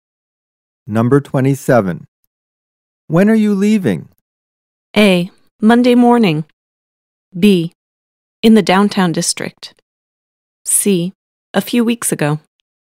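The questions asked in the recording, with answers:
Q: When are you leaving?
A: A: Monday morning.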